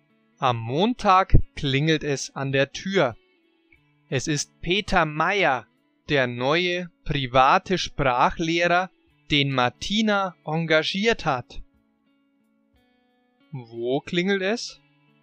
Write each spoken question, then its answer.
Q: Wo klingelt es?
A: An der Tür. Es klingelt an der Tür.